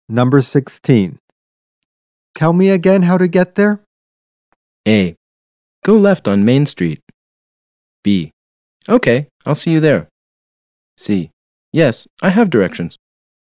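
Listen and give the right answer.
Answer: A: Go left on Main Street.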